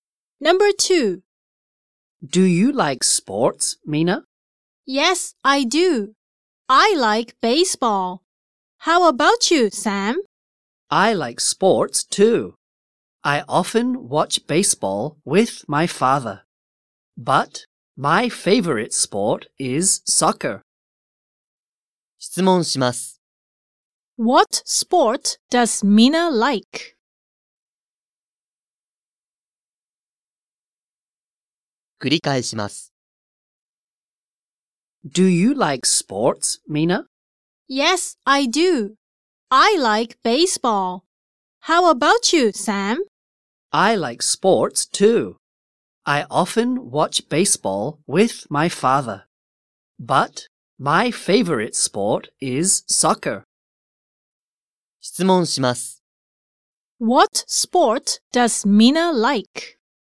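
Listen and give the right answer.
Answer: Baseball.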